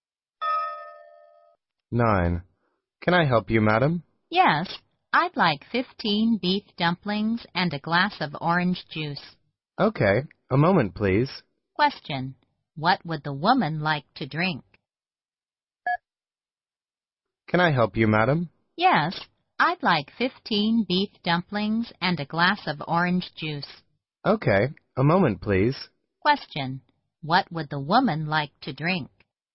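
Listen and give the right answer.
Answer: Orange juice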